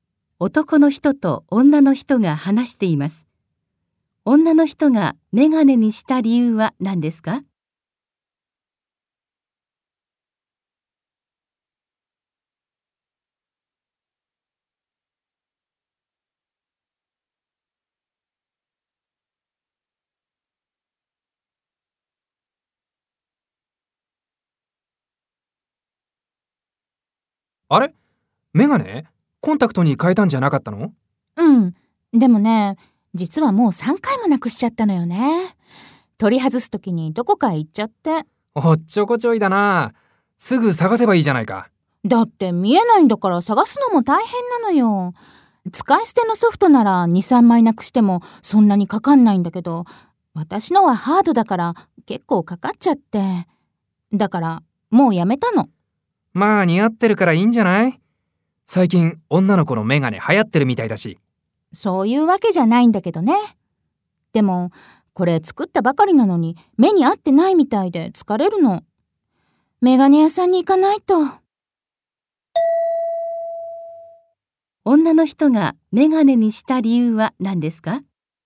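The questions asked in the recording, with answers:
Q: 女の人がメガネにした理由は何ですか?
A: ハードのコンタクトを何回もなくしてしまい、お金がかかるから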